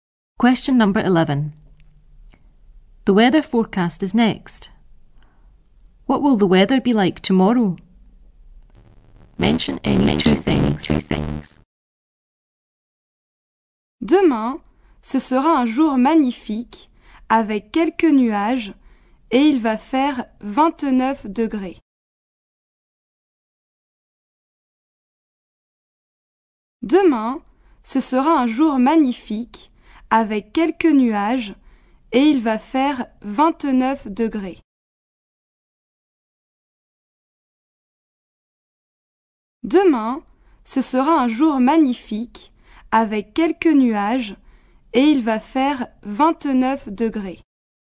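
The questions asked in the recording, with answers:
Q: What will the weather be like tomorrow?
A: A magnificent day, a few clouds, 29 degrees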